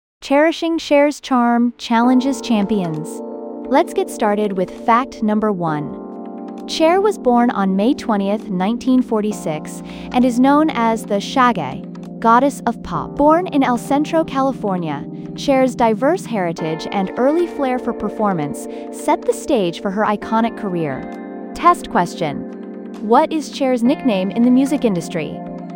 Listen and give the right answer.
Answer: Correct answer? Goddess of pop.